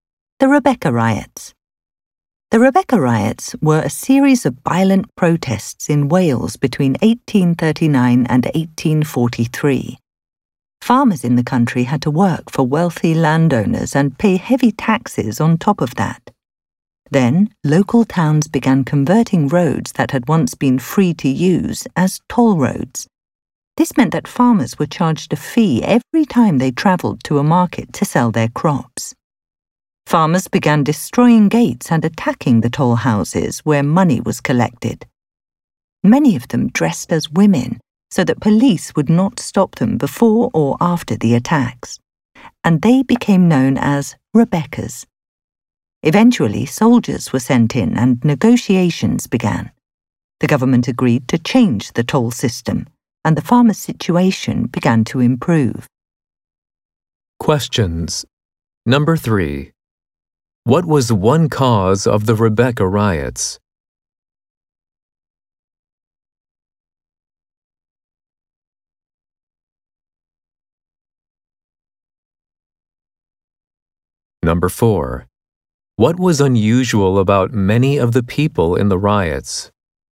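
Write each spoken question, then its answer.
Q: what was one cause of the Rebecca riots?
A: Farmers were charged fees to use roads that had become toll roads

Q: What was unusual about many of the people in the riots?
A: They dressed as women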